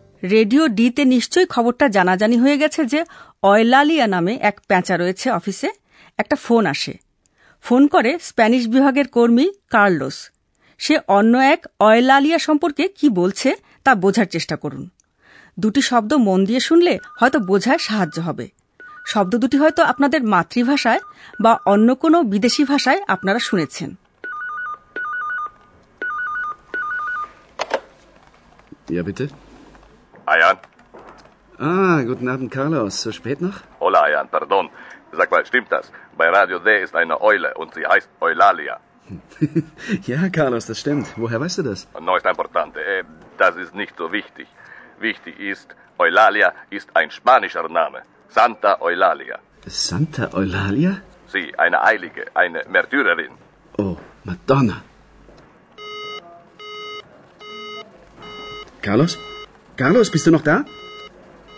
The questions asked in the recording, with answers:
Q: সে অন্য এক Eulalia সম্পর্কে কি বলছে তা বোঝার চেষ্টা করুন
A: সে বলছে Santa Eulalia সন্ত অয়লালিয়ার কথা